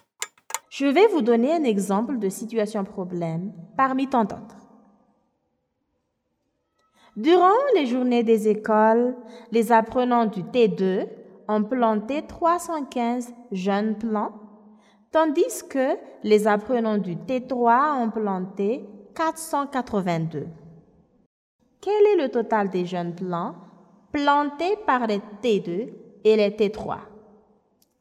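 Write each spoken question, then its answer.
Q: Quel est le total des jeunes plants plantés par les T2 et les T3?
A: 797 jeunes plants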